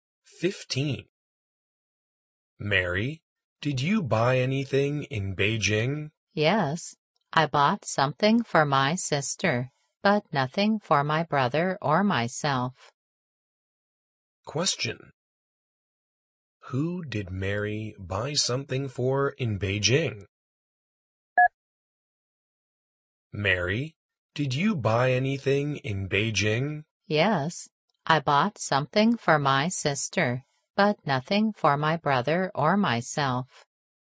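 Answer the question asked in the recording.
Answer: Her sister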